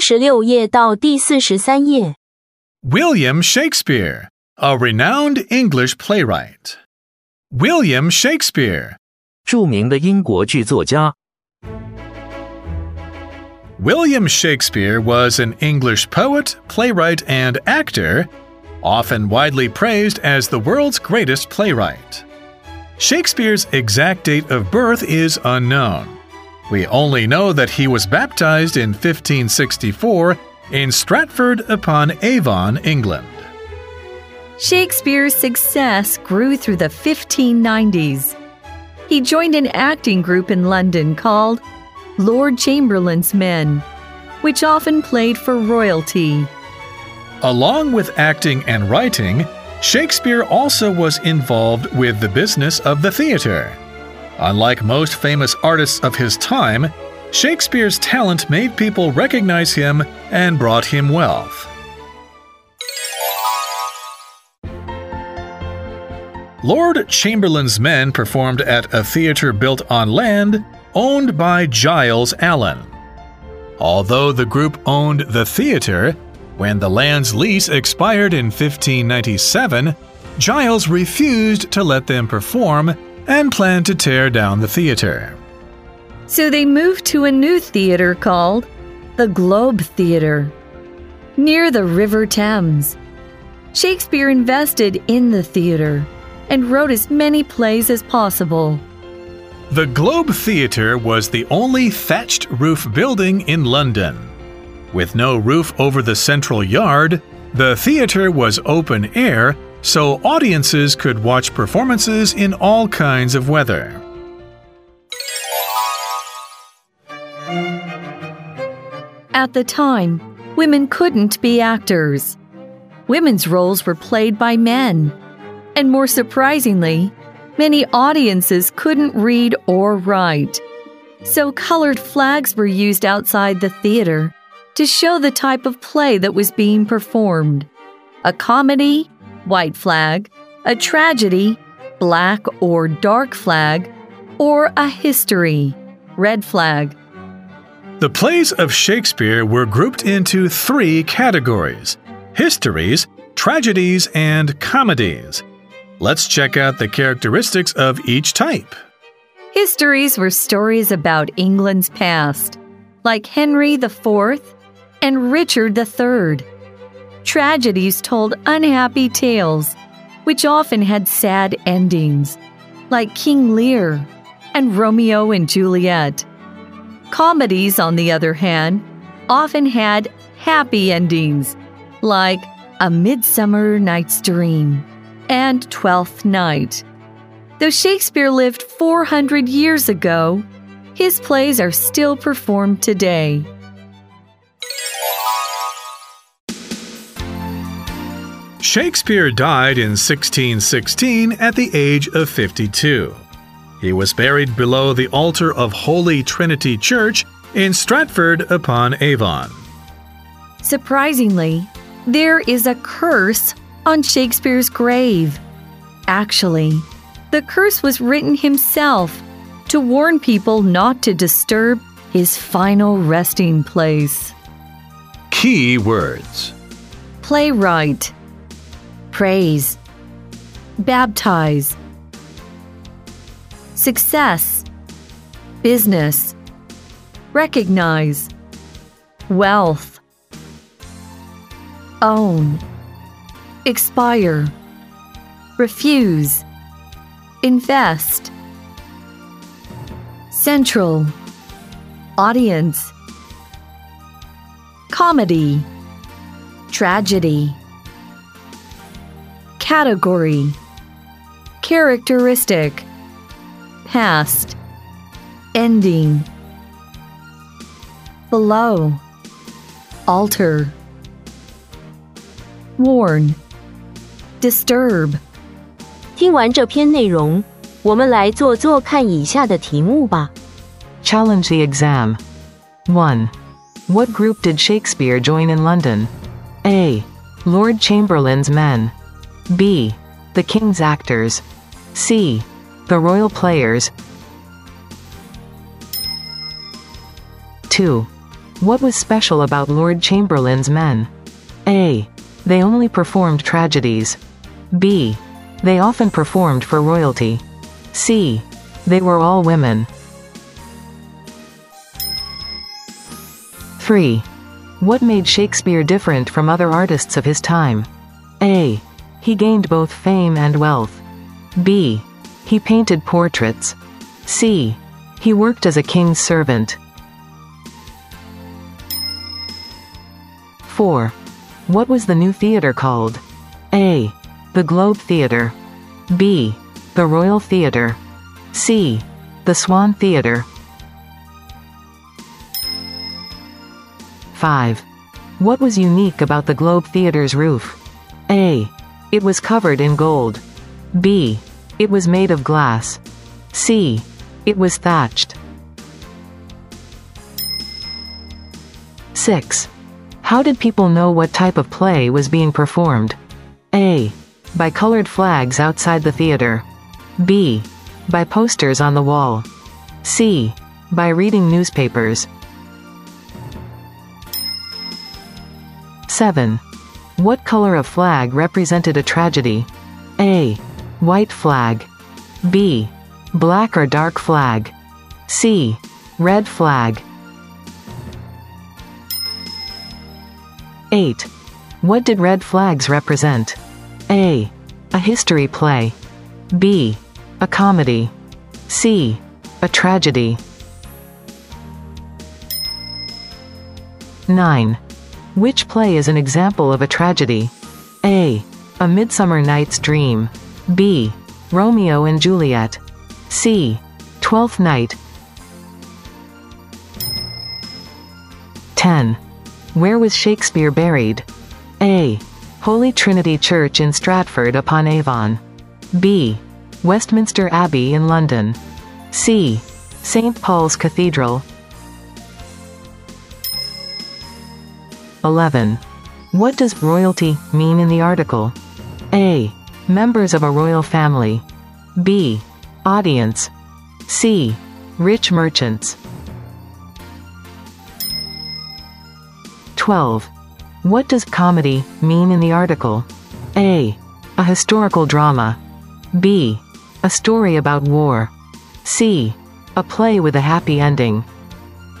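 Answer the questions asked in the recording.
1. A: Lord Chamberlain's men
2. B: They often performed for royalty
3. A: He gained both fame and wealth
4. A: The Globe Theater
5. C: It was thatched
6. A: By colored flags outside the theater
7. B: Black or dark flag
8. A: A history play
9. B: Romeo and Juliet
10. A: Holy Trinity Church in Stratford-upon-Avon
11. A: Members of a royal family
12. C: A play with a happy ending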